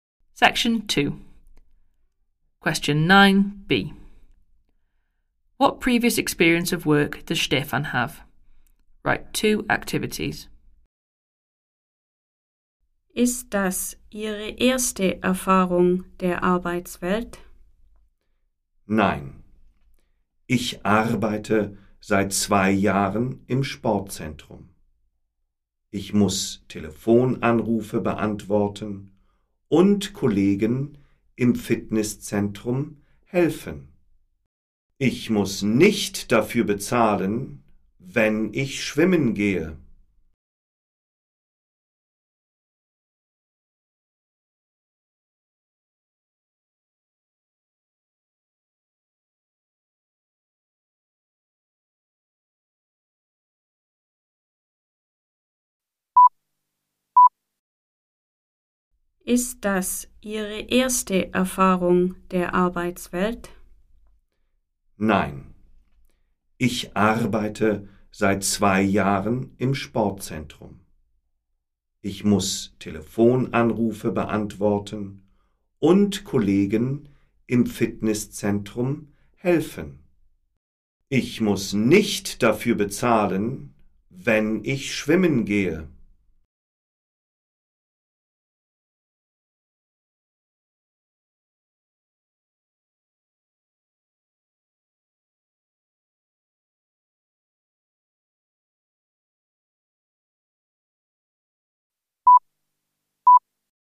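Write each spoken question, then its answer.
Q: What previous experience of work does Stefan have?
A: Working at a sports centre: answering phone calls and helping colleagues in the gym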